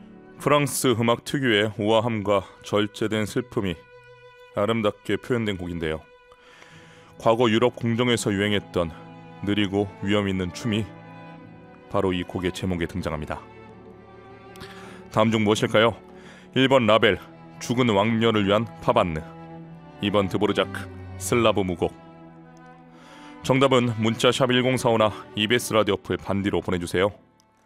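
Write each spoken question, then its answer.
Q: 다음 중 무엇일까요?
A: 1: 라벨, 죽은 왕녀를 위한 파반느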